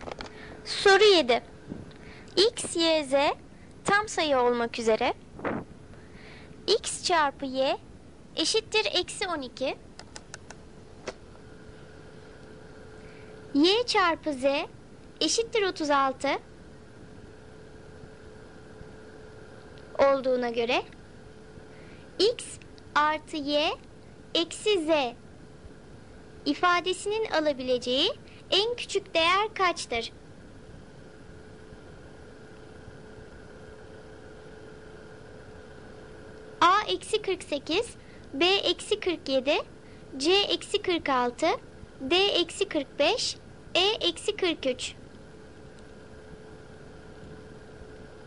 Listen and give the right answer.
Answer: Doğru cevap B eksi 47.